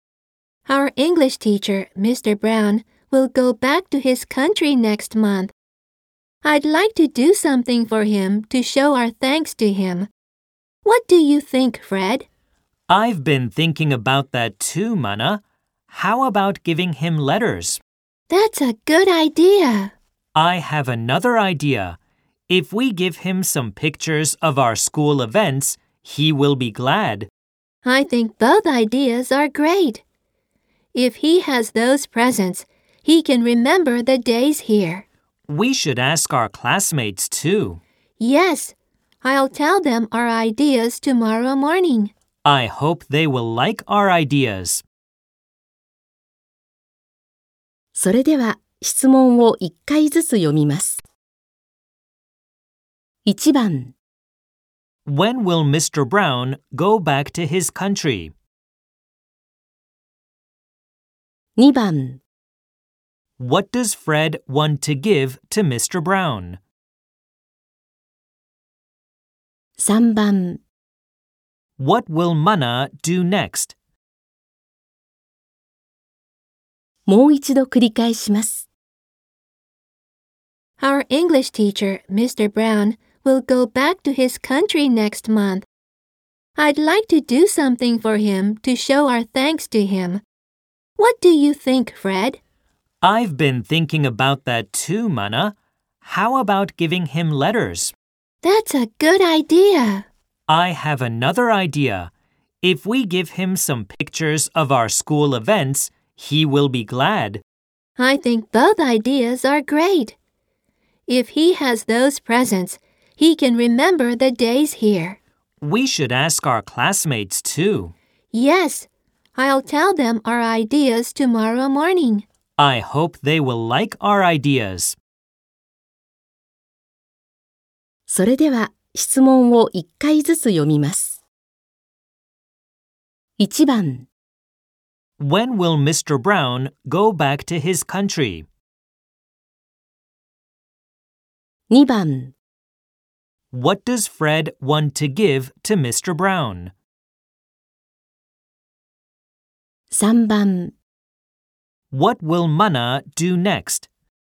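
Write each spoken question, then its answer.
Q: When will Mr. Brown go back to his country?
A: Next month

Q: What does Fred want to give to Mr.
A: Letters

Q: What will Mana do next?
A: Tell their classmates their ideas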